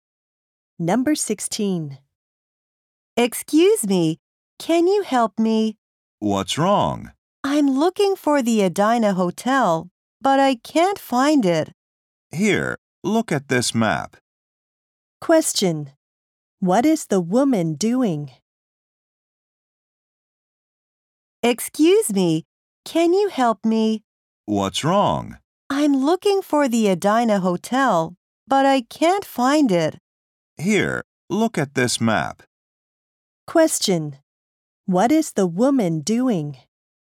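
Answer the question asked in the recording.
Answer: Looking for the Edina Hotel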